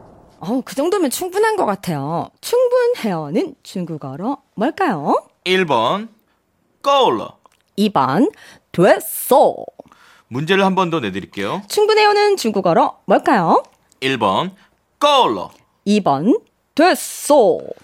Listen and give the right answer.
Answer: 1번 고라.